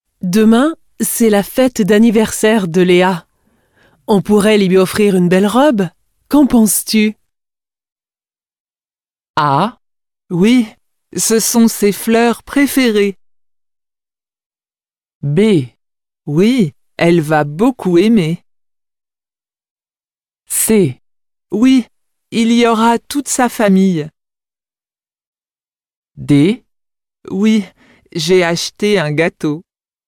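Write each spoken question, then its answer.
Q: Qu'en penses-tu?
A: B: Oui, elle va beaucoup aimer.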